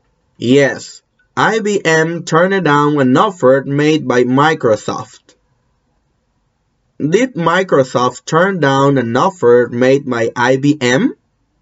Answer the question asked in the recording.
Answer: No, Microsoft didn't turn down an offer made by IBM.